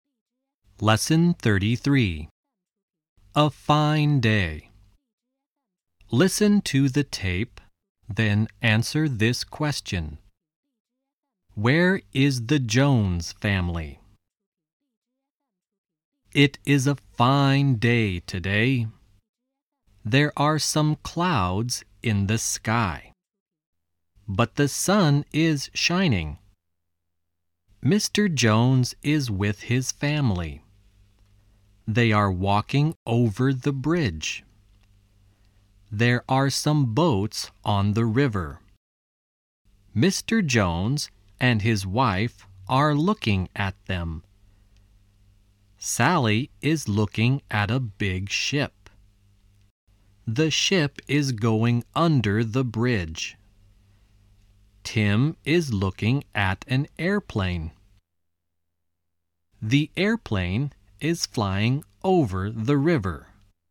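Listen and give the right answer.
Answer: On the bridge (walking over the bridge)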